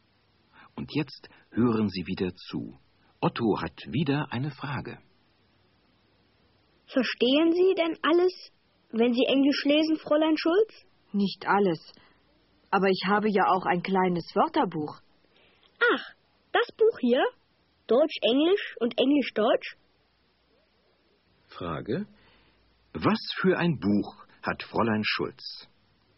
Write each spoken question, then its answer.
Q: Was für ein Buch hat Fräulein Schulz?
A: Sie hat ein Wörterbuch.